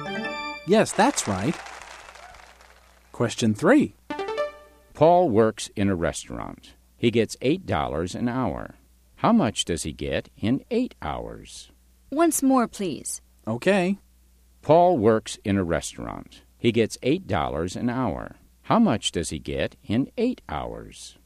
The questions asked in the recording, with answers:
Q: How much does he get in 8 hours?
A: He gets $64.